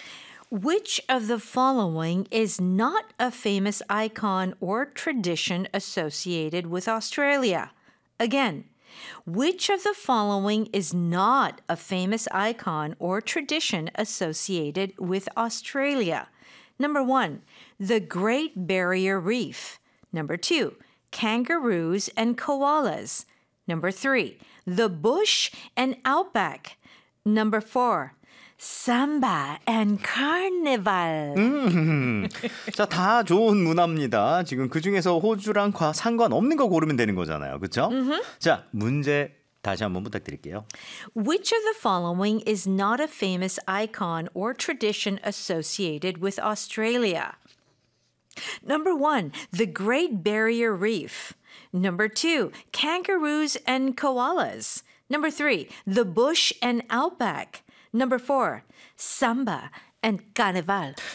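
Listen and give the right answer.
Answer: 4: Samba and Carnival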